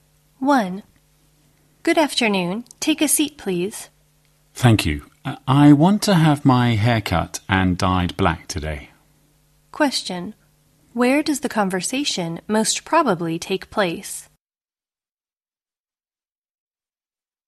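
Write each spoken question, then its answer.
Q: Where does the conversation most probably take place?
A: At a hair salon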